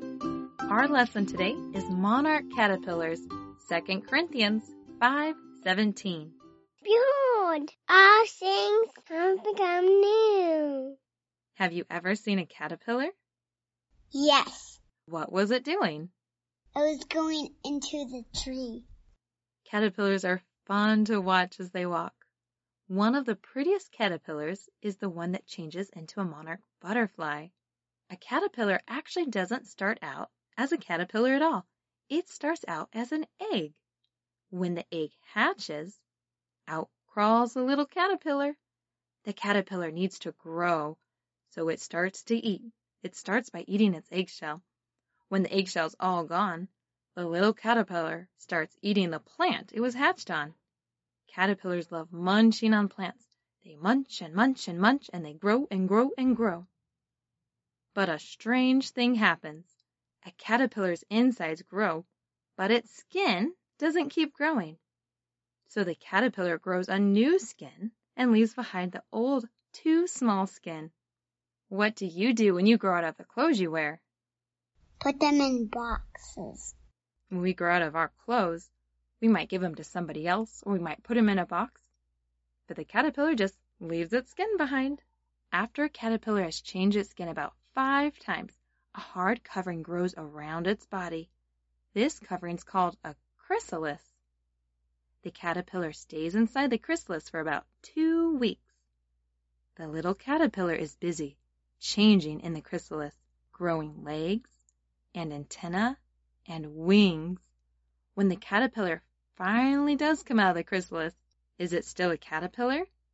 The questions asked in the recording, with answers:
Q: When the caterpillar finally does come out of the chrysalis, is it still a caterpillar?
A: No.